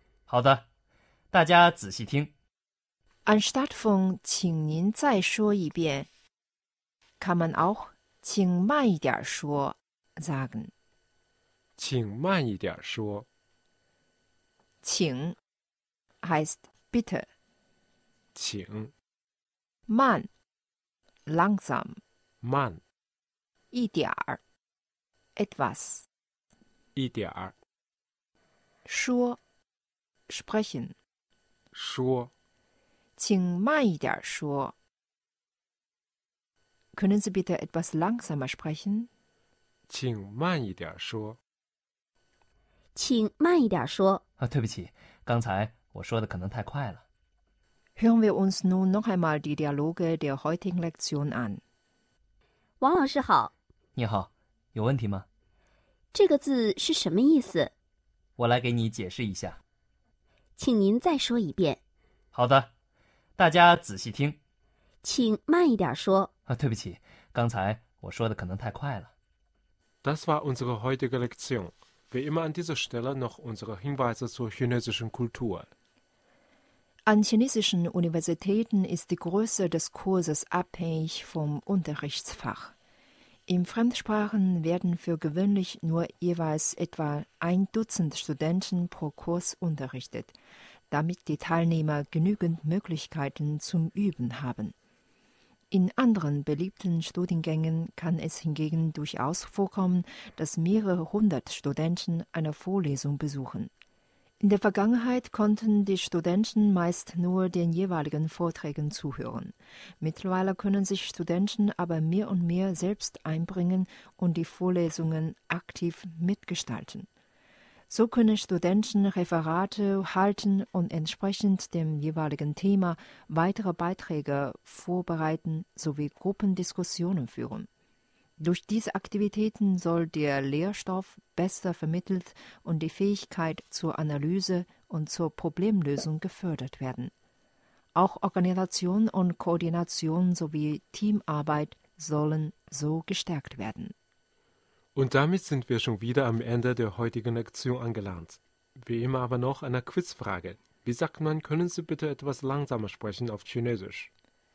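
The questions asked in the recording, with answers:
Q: Wie sagt man, können Sie bitte etwas langsamer sprechen auf Chinesisch?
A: 请慢一点说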